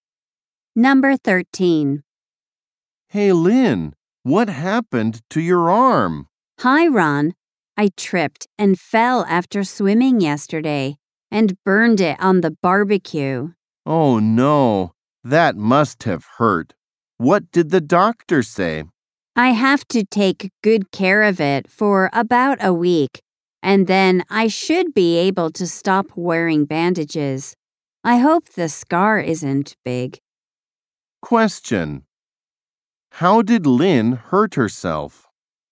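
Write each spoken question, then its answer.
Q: How did Lynn hurt herself?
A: She tripped and burned her arm on the barbecue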